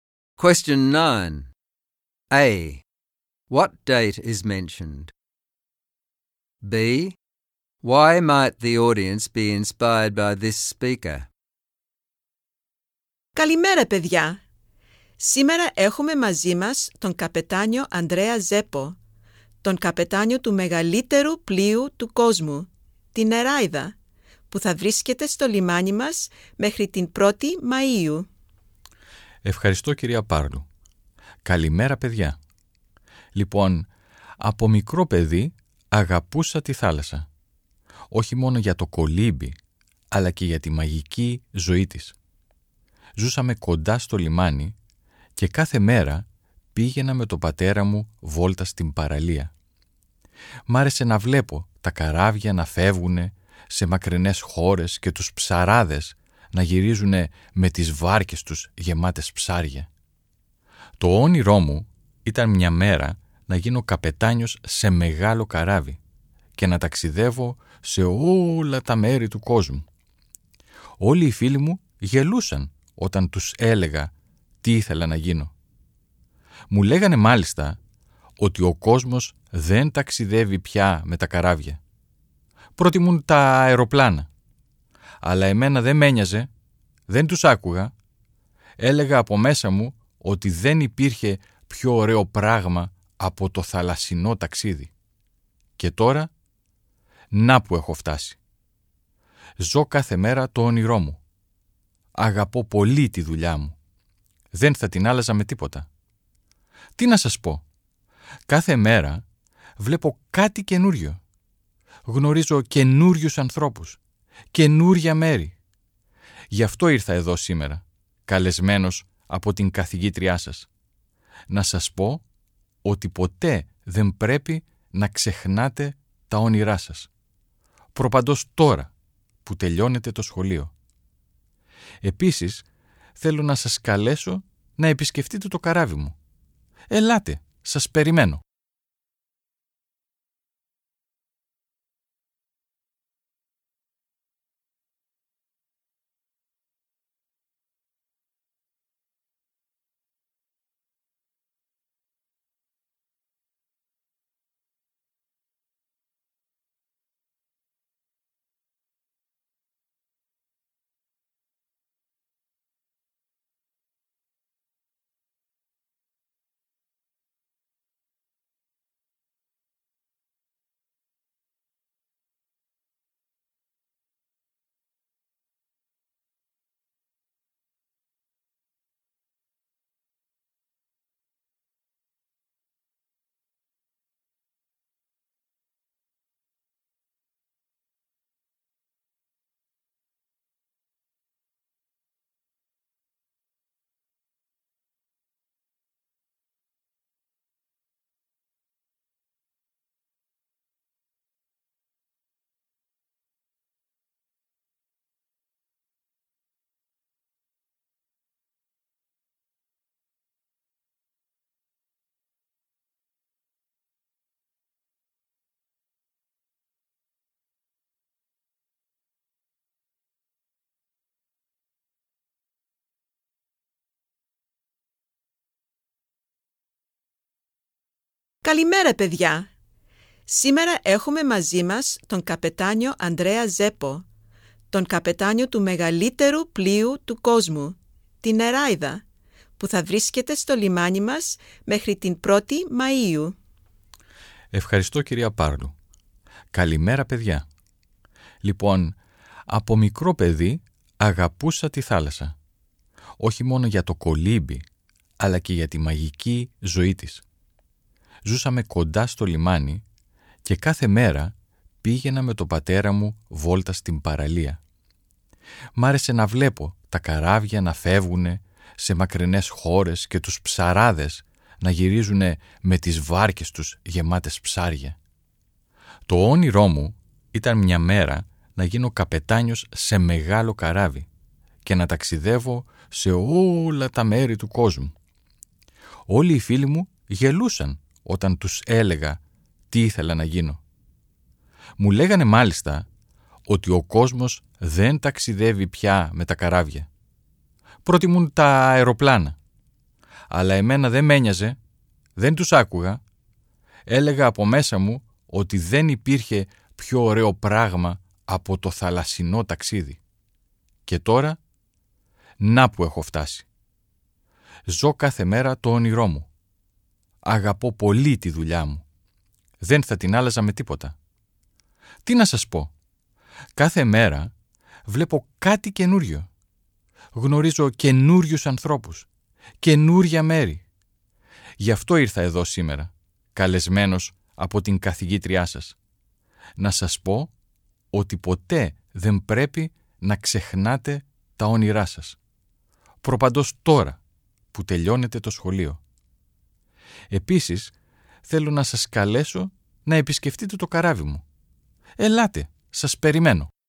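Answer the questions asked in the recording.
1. 1 May
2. He achieved his childhood dream of becoming the captain of a big ship even though his friends laughed at him. He lives his dream every day, and he tells them never to forget their dreams, especially now that they are finishing school.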